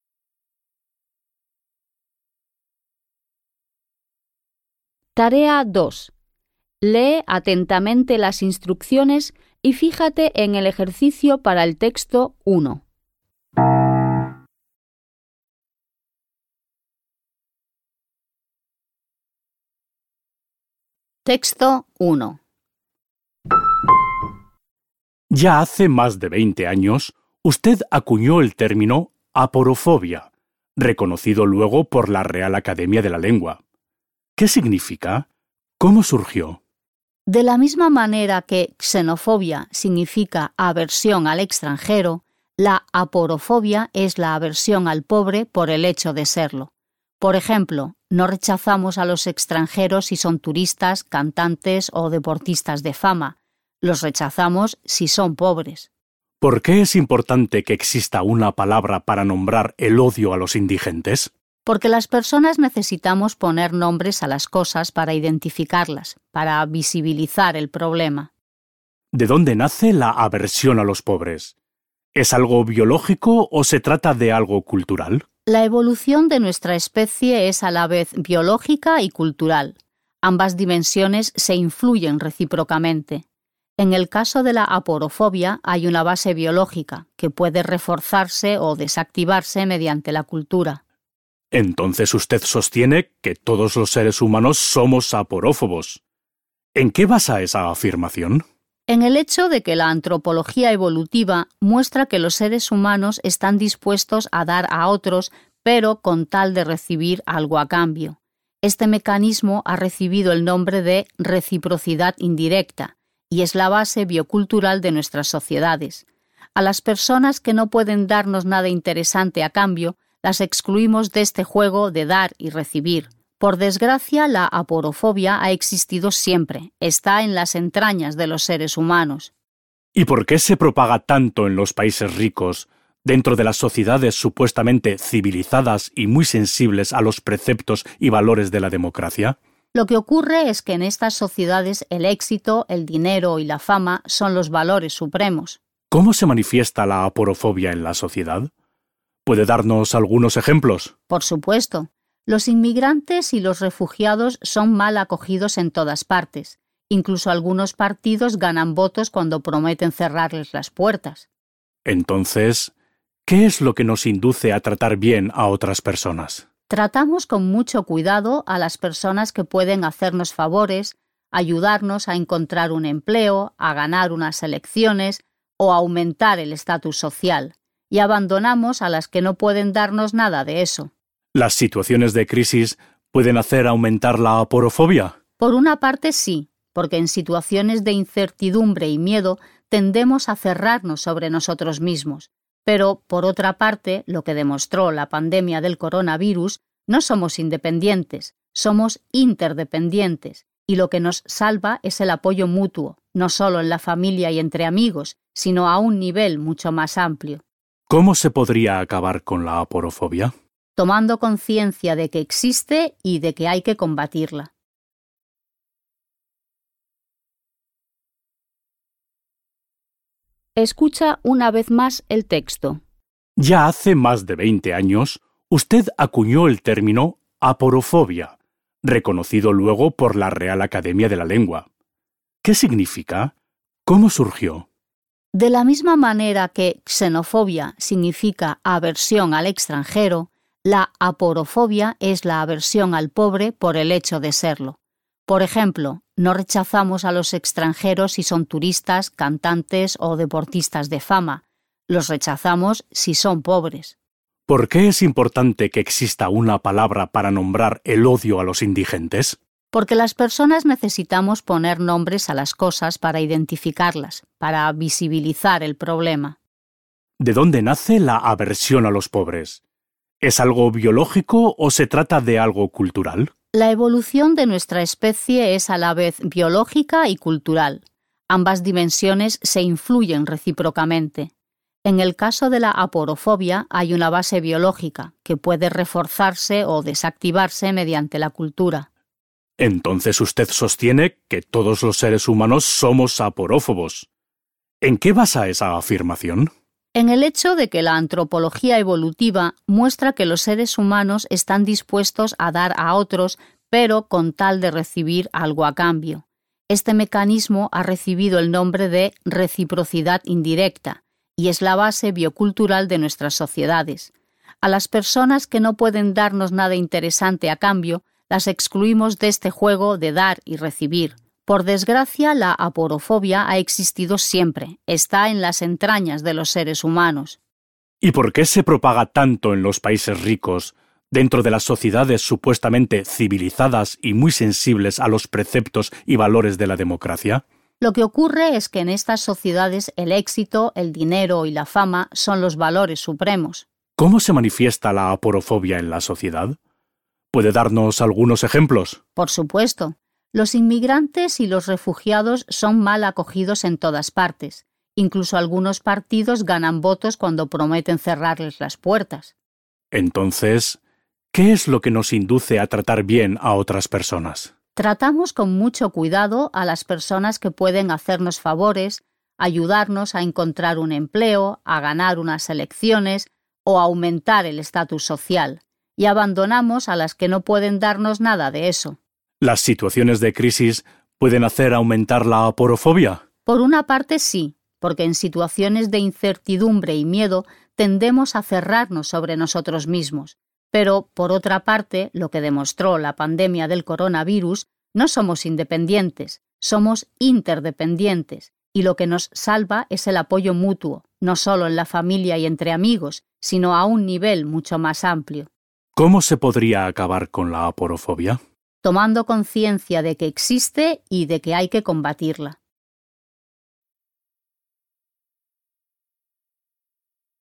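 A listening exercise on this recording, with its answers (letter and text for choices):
Vas a escuchar dos textos. Elige la respuesta correcta de entre las cuatro opciones que se ofrecen (A, B, C o D) y márcala con un círculo. Las preguntas 2.1.–2.4. corresponden al Texto 1 y las preguntas 2.5. y 2.6. corresponden al Texto 2. Escucharás la grabación dos veces.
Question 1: El término "aporofobia" surgió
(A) por decisión de un gremio.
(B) a raíz de un malentendido cultural.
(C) como sustituto de la palabra "xenofobia".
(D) para concienciar a la gente sobre la existencia de un problema.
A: (D) para concienciar a la gente sobre la existencia de un problema.

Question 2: Según la entrevistada, la aporofobia es un fenómeno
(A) de carácter universal.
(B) propio de los países pobres.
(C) de índole exclusivamente biológica.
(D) en declive en sociedades democráticas.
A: (A) de carácter universal.

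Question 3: Entre las razones que nos inducen a tratar bien a otras personas NO se citan los motivos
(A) políticos.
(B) laborales.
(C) de prestigio.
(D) sentimentales.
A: (D) sentimentales.

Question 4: La científica afirma que las crisis contribuyen a que la gente tome conciencia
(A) de la fragilidad de los vínculos familiares.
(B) del valor de ser una persona independiente.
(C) de la importancia de la solidaridad con los demás.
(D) de la necesidad de reconsiderar la fuerza de los lazos de amistad.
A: (C) de la importancia de la solidaridad con los demás.

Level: Poziom: dwujęzyczny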